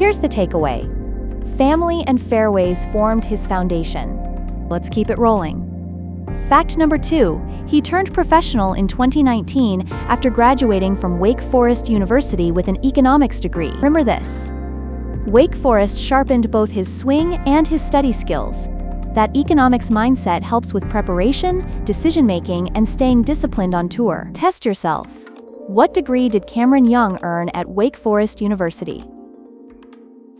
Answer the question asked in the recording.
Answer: Correct answer, economics.